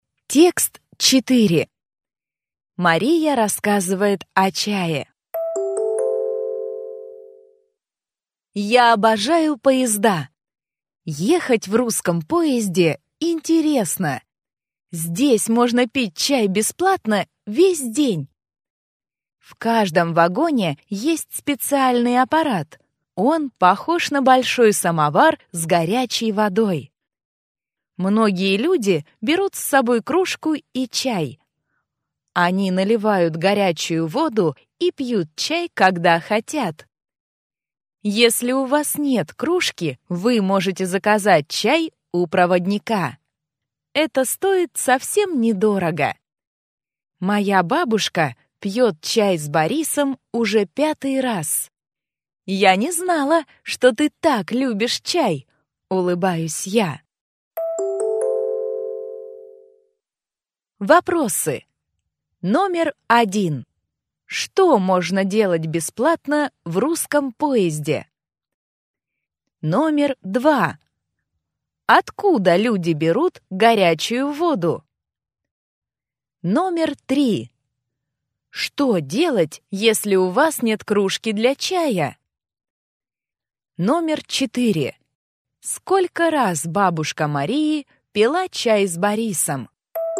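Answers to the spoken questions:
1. Пить чай весь день
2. Из специального аппарата в вагоне, похожего на большой самовар
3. Заказать чай у проводника
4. 5 раз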